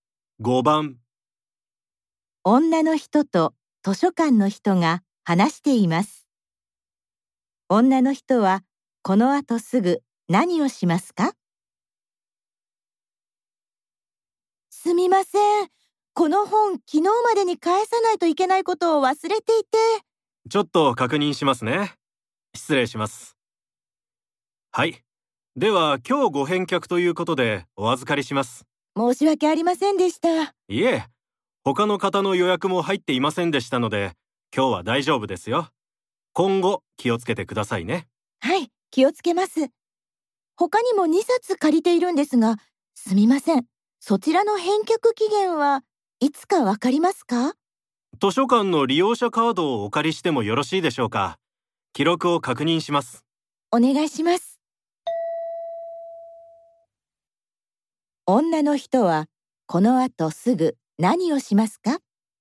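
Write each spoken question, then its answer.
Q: 女の人はこの後すぐ何をしますか?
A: 図書館の利用者カードを渡す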